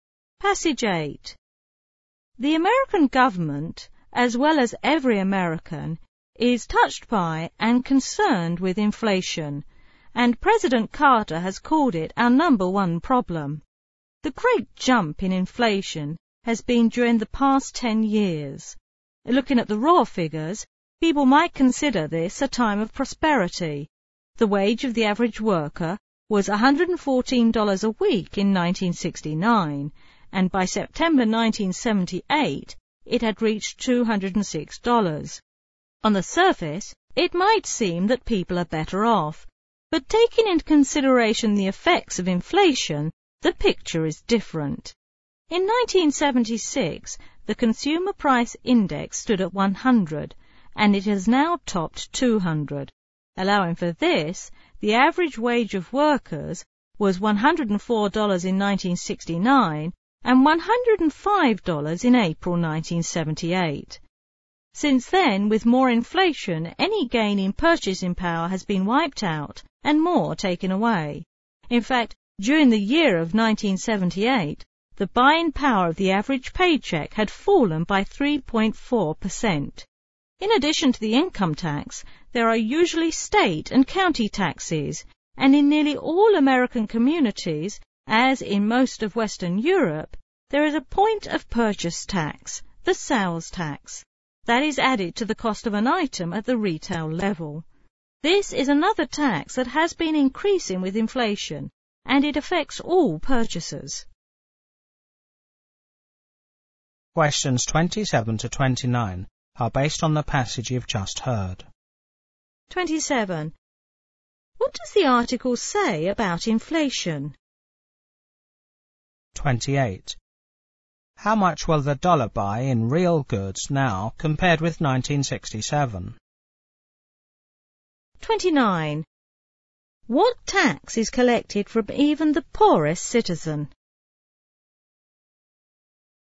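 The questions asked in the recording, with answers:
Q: What tax is collected from even the poorest citizen?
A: The sales tax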